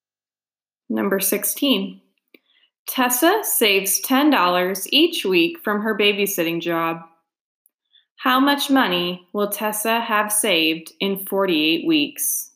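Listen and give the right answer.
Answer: $480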